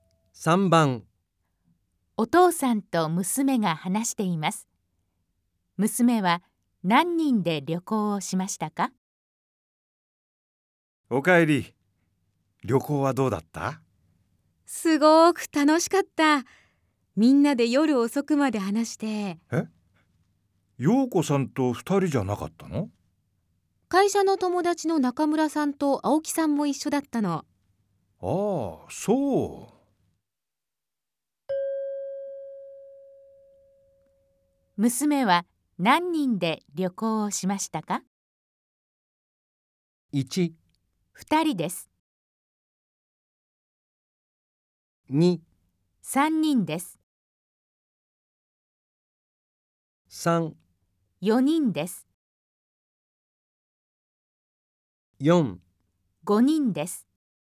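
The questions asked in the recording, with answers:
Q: 娘は何人で旅行をしましたか?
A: 3: 4人です。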